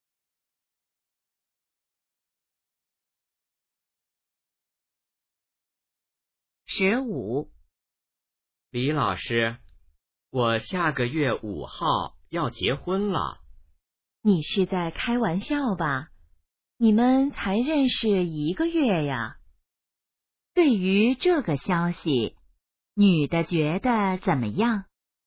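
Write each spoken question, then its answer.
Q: 女的觉得怎么样?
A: 不相信,很吃惊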